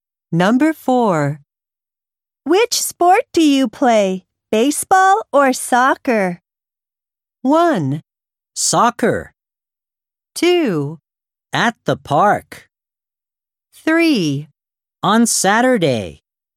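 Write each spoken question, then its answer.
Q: Which sport do you play, baseball or soccer?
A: 1: Soccer.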